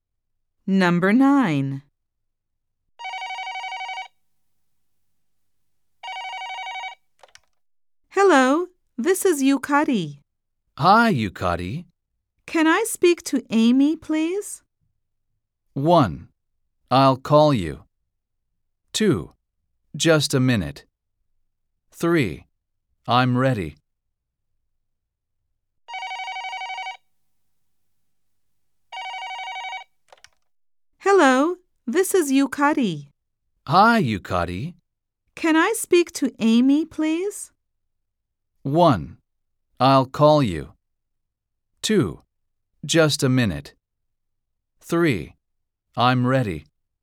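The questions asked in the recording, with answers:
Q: Can I speak to Amy, please?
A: 2: Just a minute.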